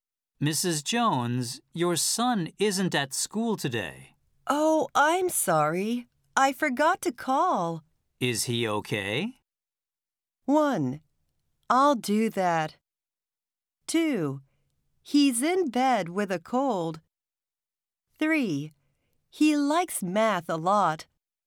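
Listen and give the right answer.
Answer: 2: He's in bed with a cold.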